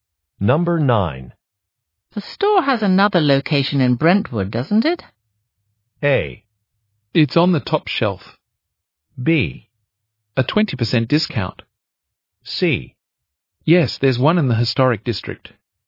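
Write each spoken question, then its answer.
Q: The store has another location in Brentwood, doesn't it?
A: C: Yes, there's one in the historic district.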